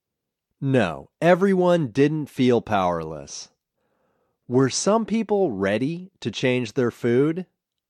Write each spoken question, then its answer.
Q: Were some people ready to change their food?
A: Yes, some people were ready to change their food.